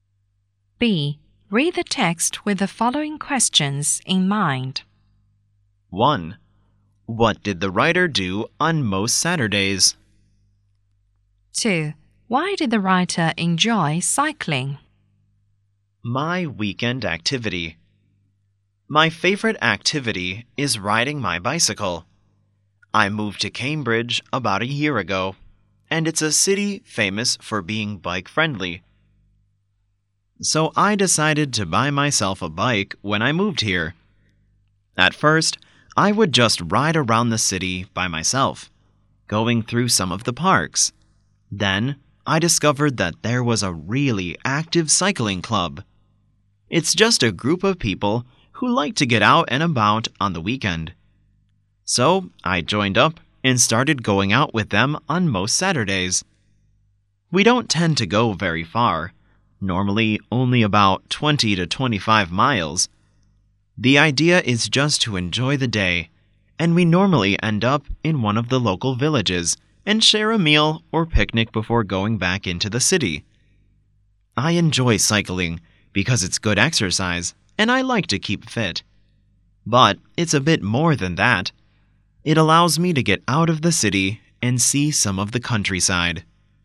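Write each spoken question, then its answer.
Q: What did the writer do on most Saturdays?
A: Went out cycling with a cycling club

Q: Why did the writer enjoy cycling?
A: It's good exercise, keeps him fit, and lets him get out of the city to see the countryside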